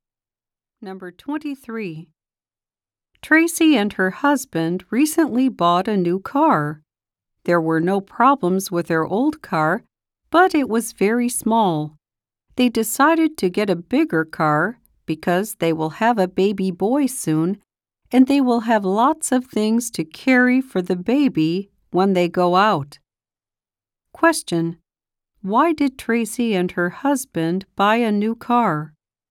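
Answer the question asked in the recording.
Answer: They will have a baby soon and need a bigger car.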